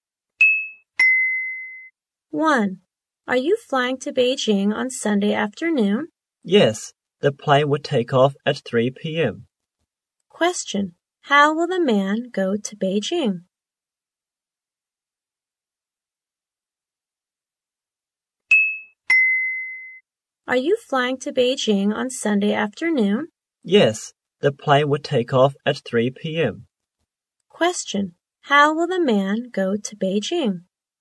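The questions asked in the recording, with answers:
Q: Question, how will the man go to Beijing?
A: By plane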